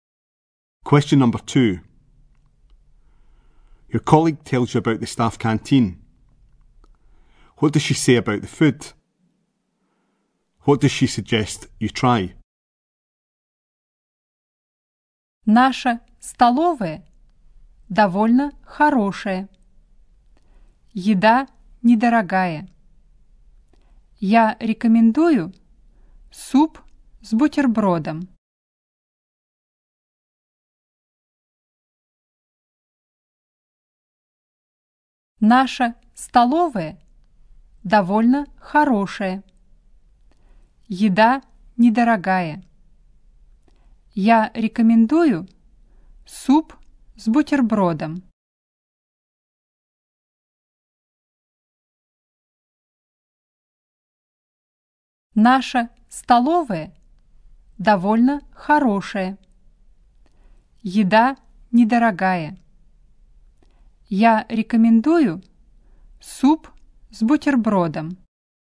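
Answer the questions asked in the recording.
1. It is inexpensive
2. Soup with a sandwich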